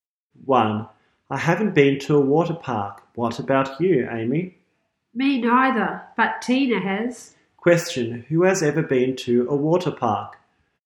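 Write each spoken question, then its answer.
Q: Question, who has ever been to a water park?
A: Tina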